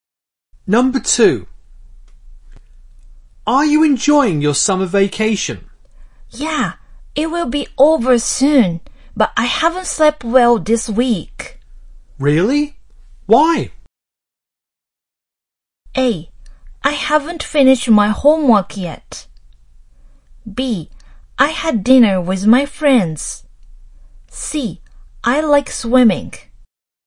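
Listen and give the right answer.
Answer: A: I haven't finished my homework yet.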